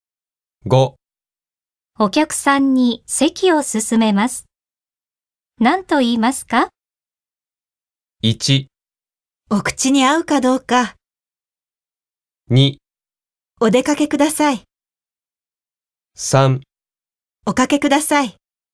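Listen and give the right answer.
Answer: 3: おかけください。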